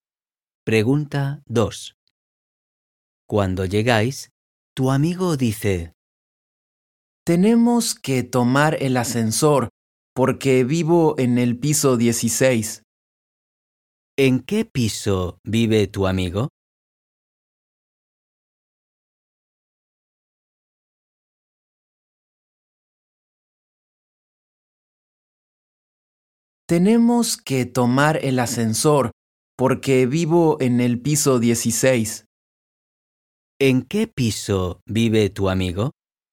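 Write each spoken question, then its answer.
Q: ¿En qué piso vive tu amigo?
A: en el piso 16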